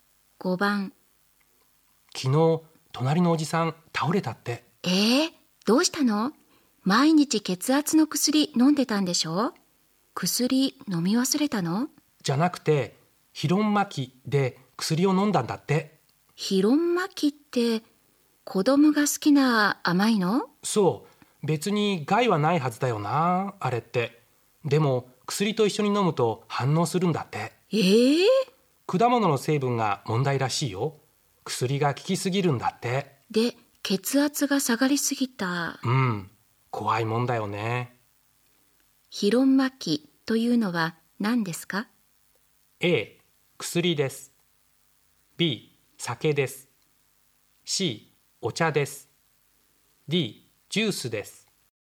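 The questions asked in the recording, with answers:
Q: ヒロンマキというのは何ですか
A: D: ジュースです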